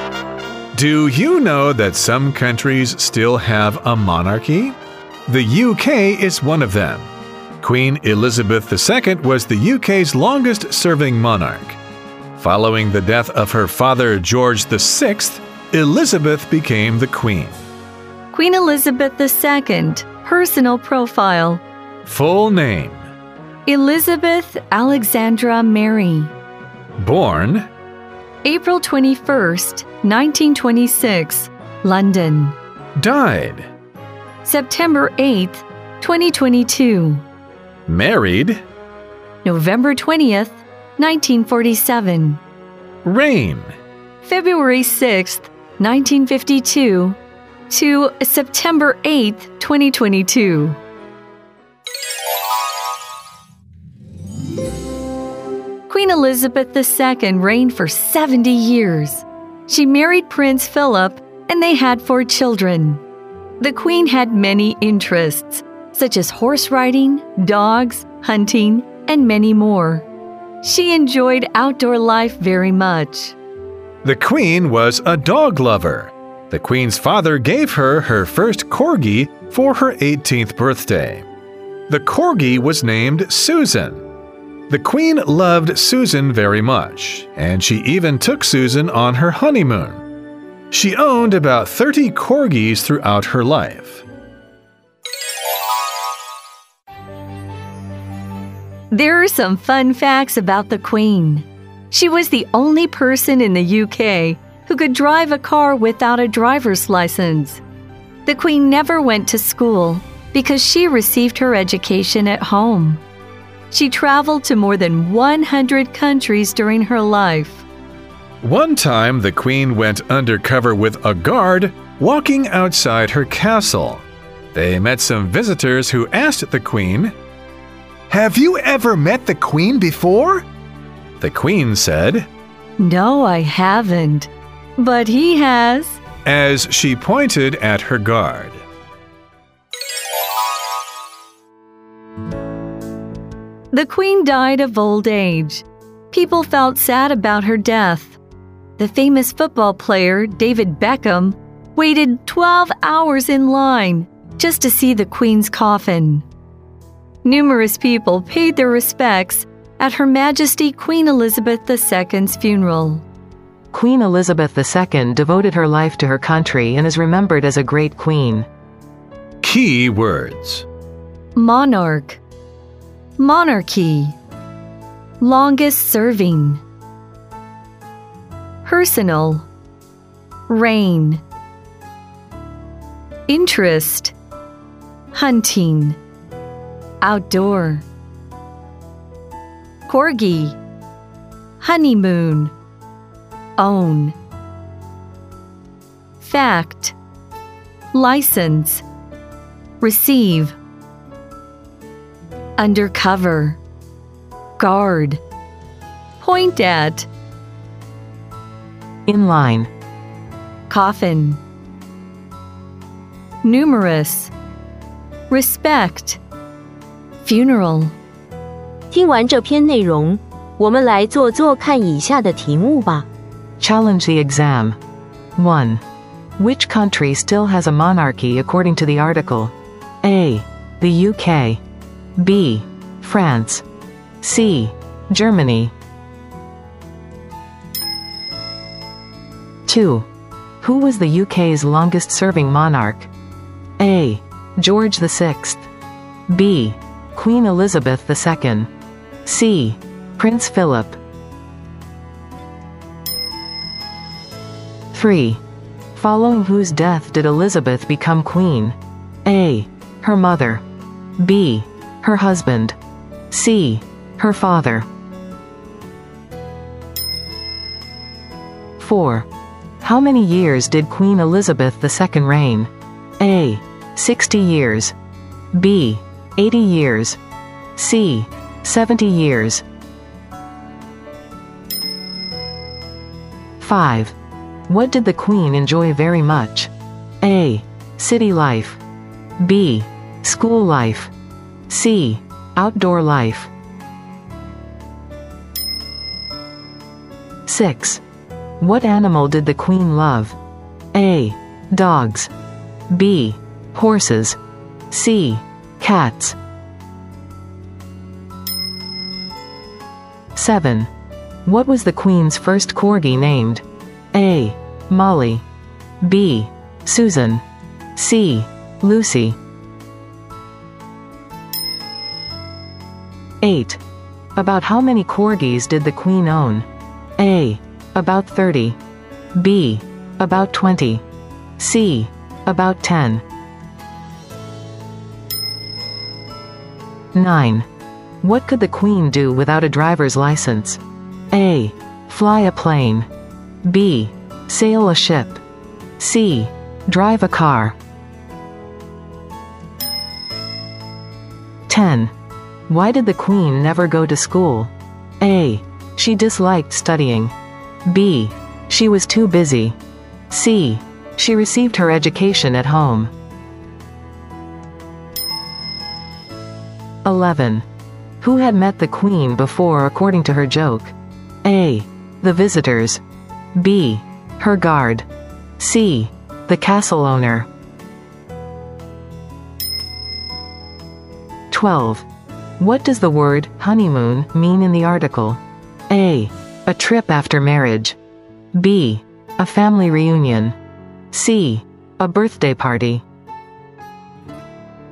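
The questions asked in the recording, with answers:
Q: Which country still has a monarchy according to the article?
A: A: The UK.

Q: Who was the UK's longest-serving monarch?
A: B: Queen Elizabeth II.

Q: Following whose death did Elizabeth become queen?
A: C: Her father.

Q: How many years did Queen Elizabeth II reign?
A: C: 70 years.

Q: What did the Queen enjoy very much?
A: C: Outdoor life.

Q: What animal did the Queen love?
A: A: Dogs.

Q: What was the Queen's first corgi named?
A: B: Susan.

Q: About how many corgis did the Queen own?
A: A: About 30.

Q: What could the Queen do without a driver's license?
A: C: Drive a car.

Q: Why did the Queen never go to school?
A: C: She received her education at home.

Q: Who had met the Queen before according to her joke?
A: B: Her guard.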